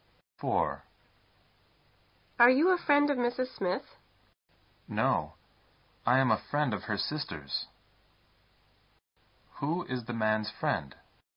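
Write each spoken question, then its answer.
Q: Who is the man's friend?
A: Mrs. Smith's sister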